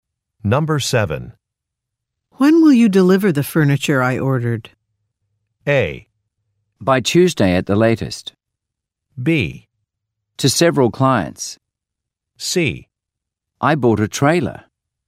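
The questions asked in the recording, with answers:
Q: When will you deliver the furniture I ordered?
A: A: By Tuesday at the latest.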